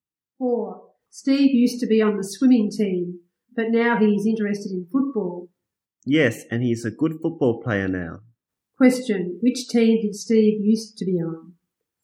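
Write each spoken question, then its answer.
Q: Which team did Steve used to be on?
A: The swimming team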